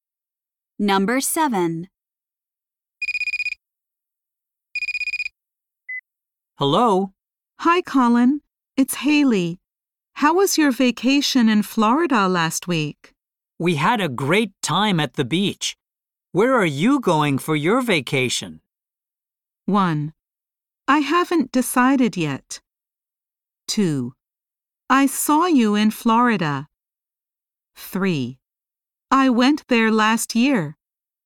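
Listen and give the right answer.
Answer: 1: I haven't decided yet.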